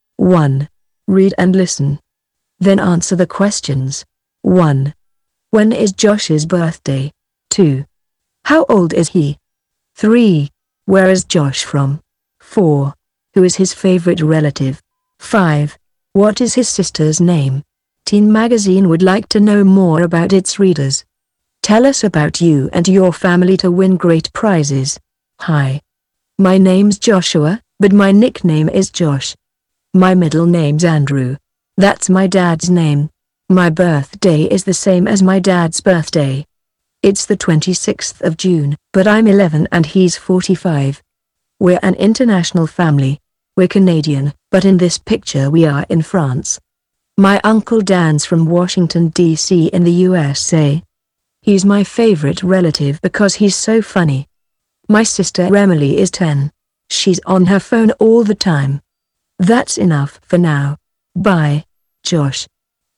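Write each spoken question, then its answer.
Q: When is Josh's birthday?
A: The 26th of June

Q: How old is he?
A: 11

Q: Where is Josh from?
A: Canada

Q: Who is his favorite relative?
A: His uncle Dan

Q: What is his sister's name?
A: Emily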